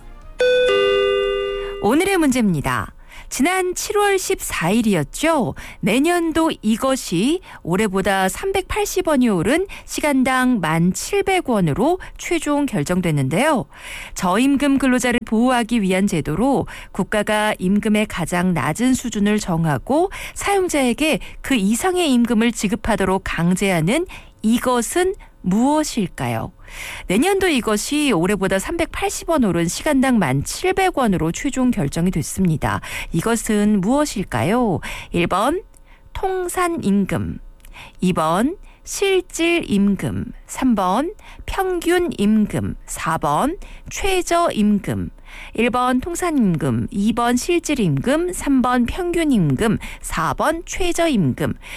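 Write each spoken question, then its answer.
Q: 이것은 무엇일까요? 1번 통산임금, 2번 실질임금, 3번 평균임금, 4번 최저임금.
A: 4: 최저임금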